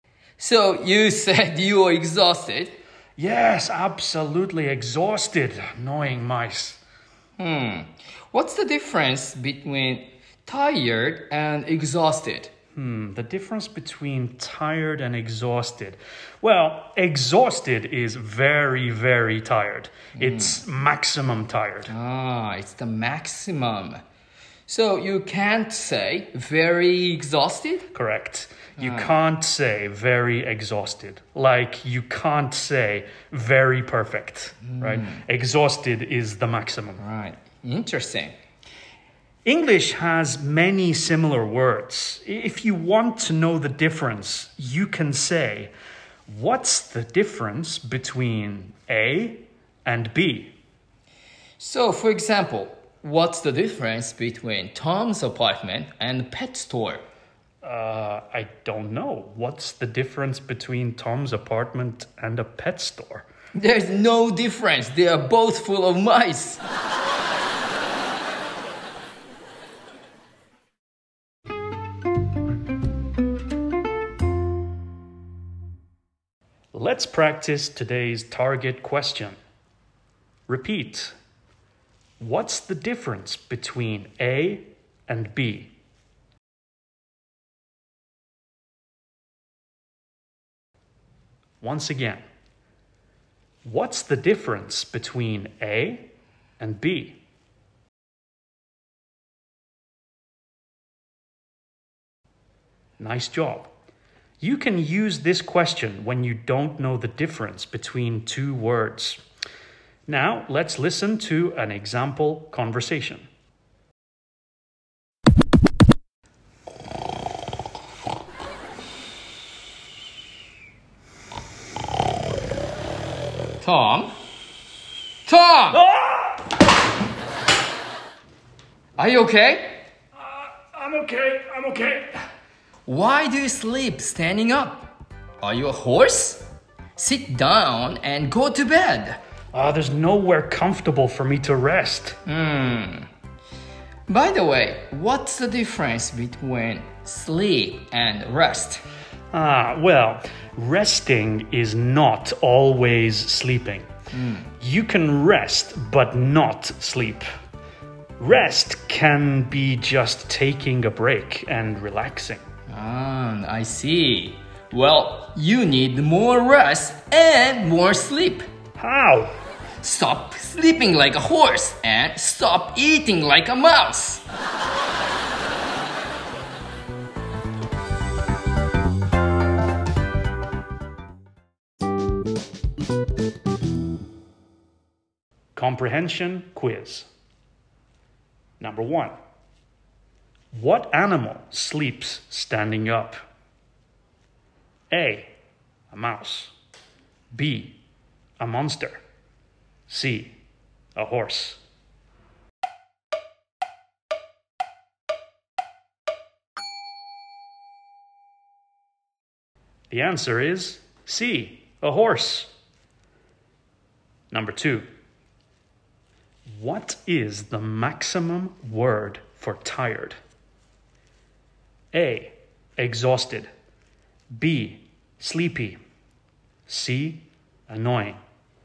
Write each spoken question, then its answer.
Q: What animal sleeps standing up?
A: The answer is C, a horse.

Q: What is the maximum word for tired?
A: The answer is A, exhausted.